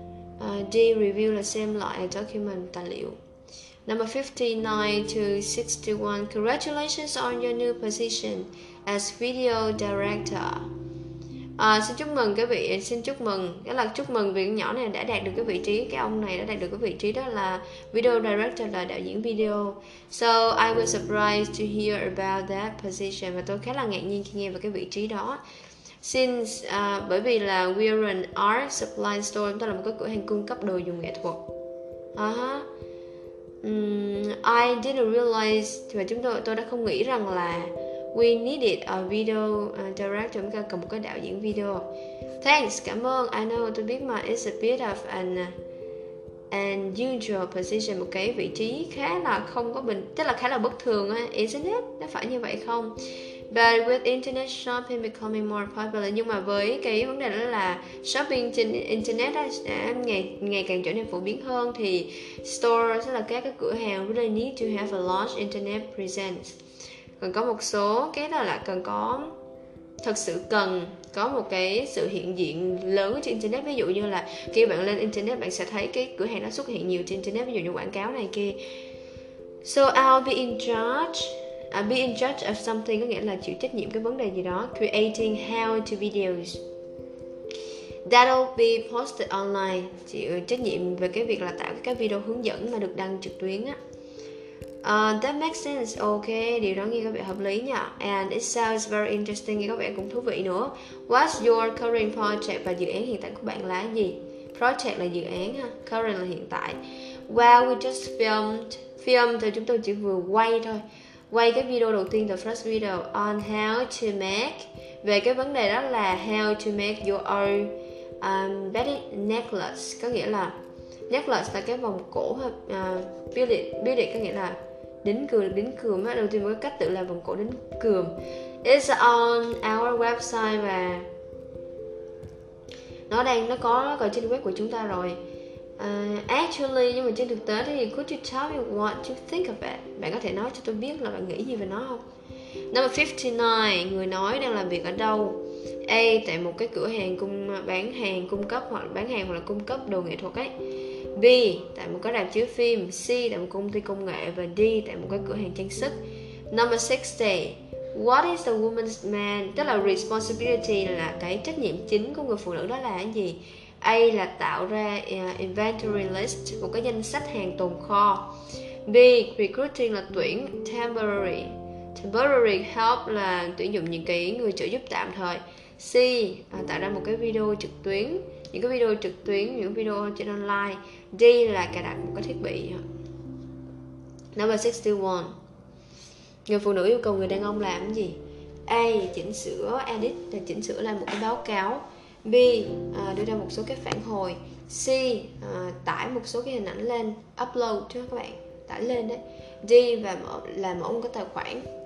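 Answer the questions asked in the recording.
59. A: tại một cửa hàng cung cấp đồ nghệ thuật
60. C: tạo ra những video trực tuyến
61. B: đưa ra một số phản hồi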